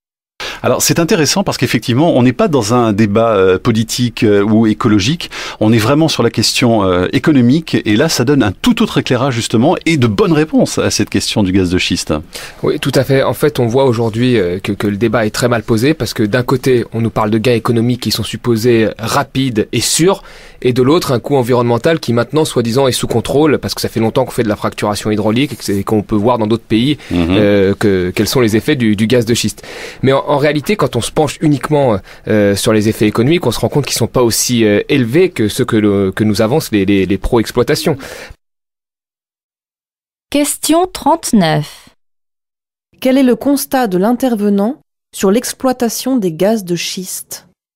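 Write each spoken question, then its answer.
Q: Quel est le constat de l'intervenant sur l'exploitation des gaz de schiste ?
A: Le débat est mal posé : les gains économiques sont moins élevés que ce qu'avancent les partisans de l'exploitation.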